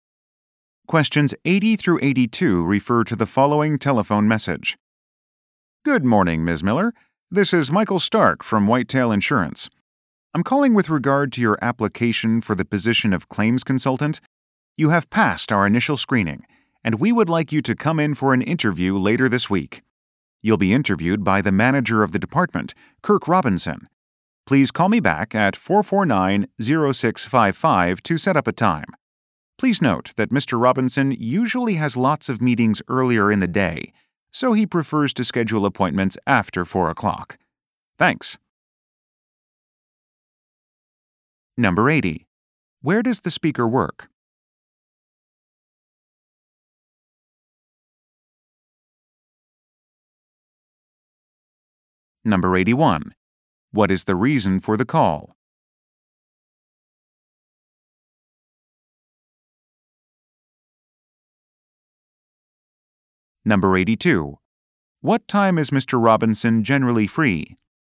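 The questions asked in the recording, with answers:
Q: Where does the speaker work?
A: At an insurance company (Whitetail Insurance)

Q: What is the reason for the call?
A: To invite Ms. Miller to a job interview

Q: What time is Mr. Robinson generally free?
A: After 4 o'clock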